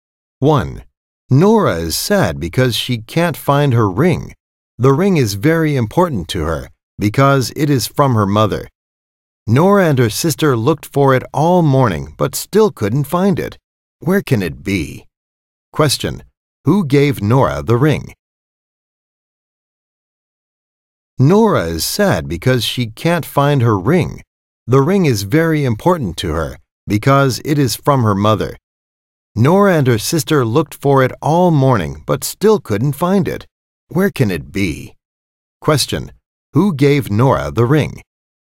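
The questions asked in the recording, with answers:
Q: Who gave Nora the ring?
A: Her mother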